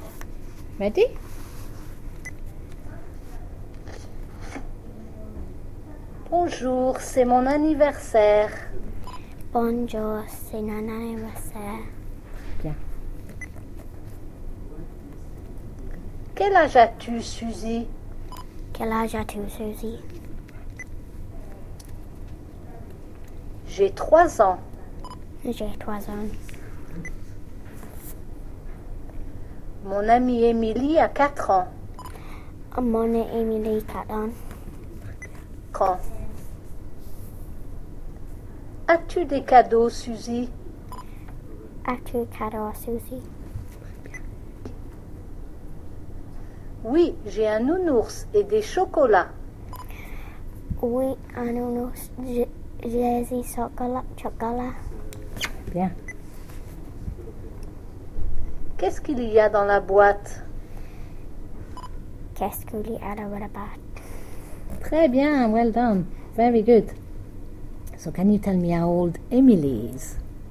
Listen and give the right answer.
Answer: Mon amie Emily a 4 ans.